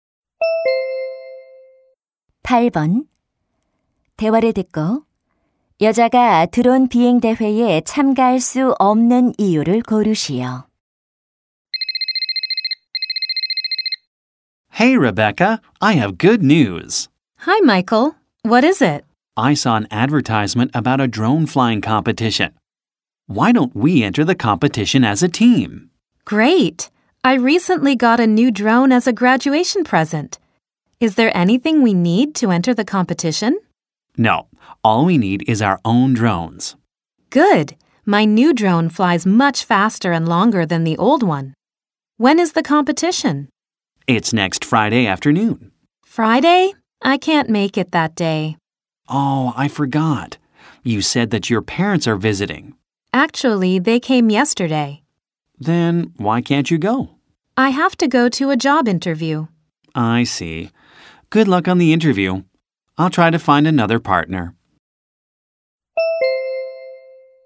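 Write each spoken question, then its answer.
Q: 대화를 듣고 여자가 드론 비행 대회에 참가할 수 없는 이유를 고르시오.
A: 취업 면접에 가야 해서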